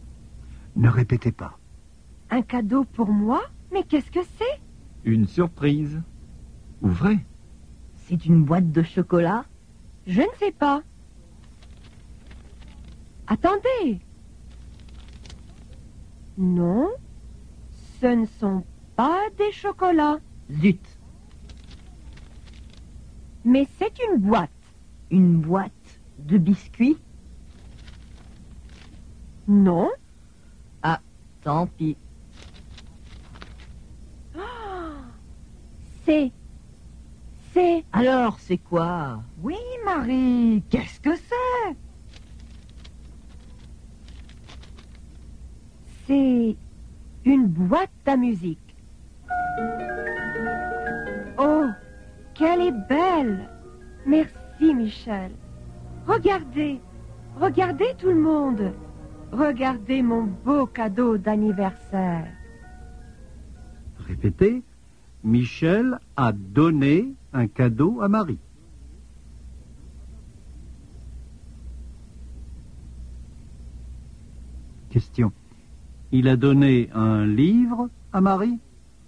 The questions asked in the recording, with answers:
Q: Il a donné un livre à Marie?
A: Non, il n'a pas donné de livre à Marie.